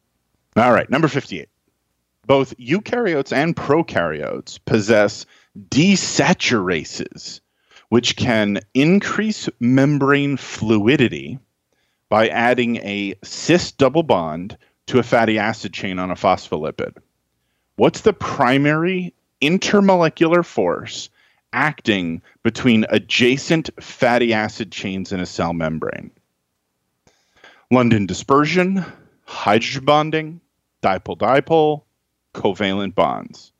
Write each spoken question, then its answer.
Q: What's the primary intermolecular force acting between adjacent fatty acid chains in a cell membrane?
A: The question was just asking with the primary force in a cell membrane, and overwhelmingly, that's London dispersion.